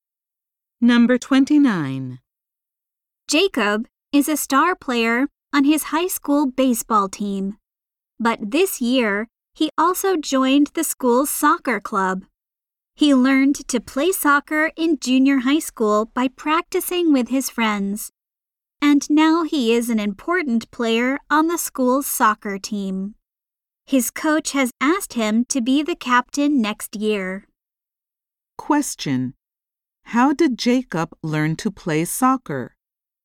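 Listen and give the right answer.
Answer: By practicing with his friends in junior high school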